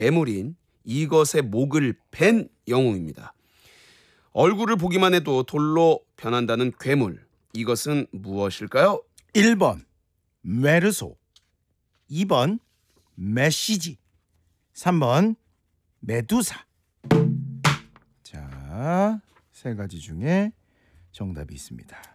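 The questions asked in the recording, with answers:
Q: 얼굴을 보기만 해도 돌로 변한다는 괴물, 이것은 무엇일까요?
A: 3번: 메두사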